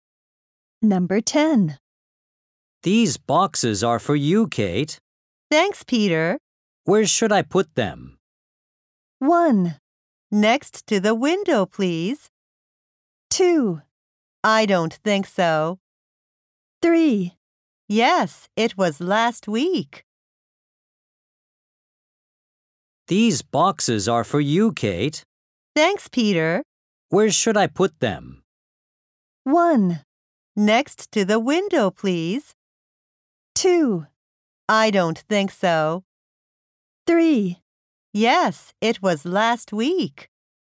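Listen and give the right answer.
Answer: 1: Next to the window, please.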